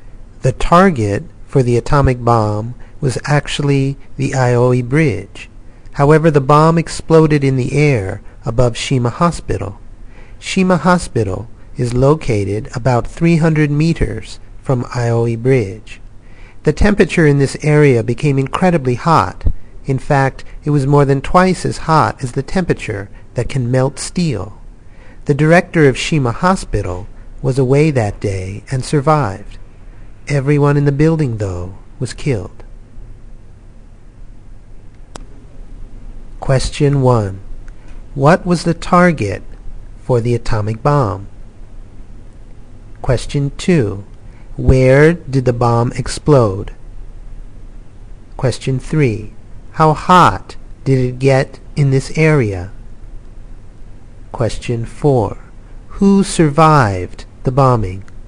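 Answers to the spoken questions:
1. The Aioi Bridge
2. In the air above Shima Hospital
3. More than twice as hot as the temperature that can melt steel
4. The director of Shima Hospital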